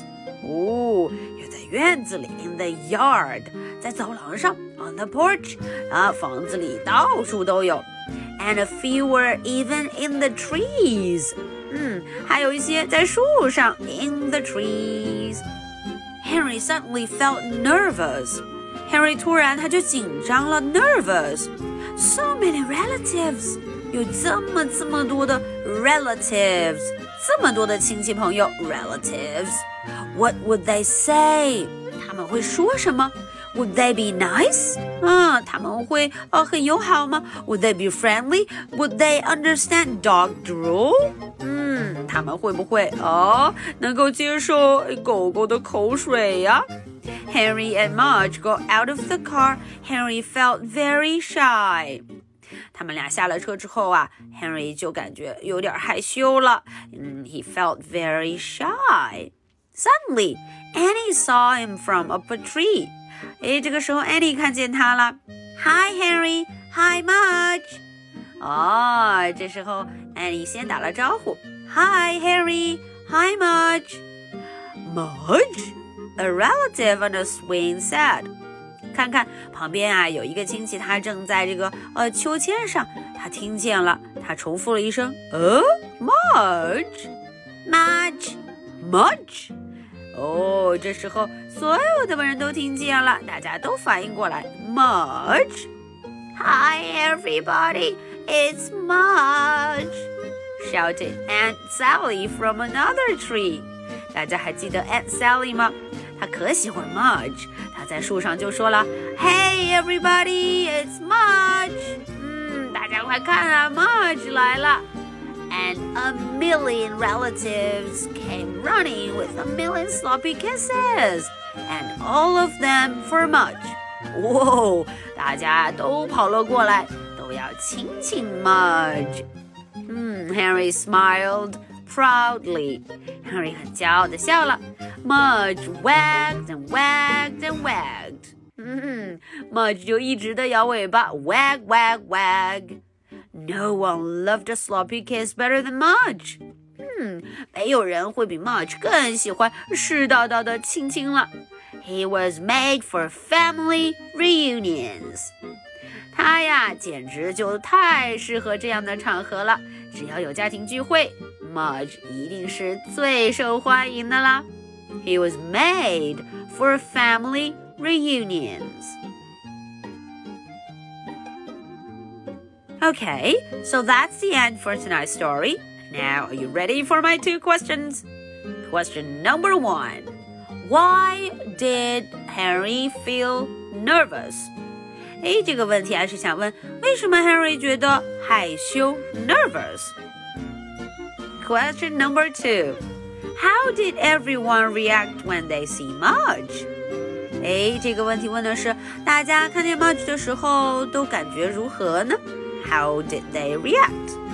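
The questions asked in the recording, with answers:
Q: Why did Harry feel nervous?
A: There were so many relatives, and he didn't know what they would say or if they would be nice or understand dog drool

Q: How did everyone react when they see Marge?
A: They all came running to give Mudge sloppy kisses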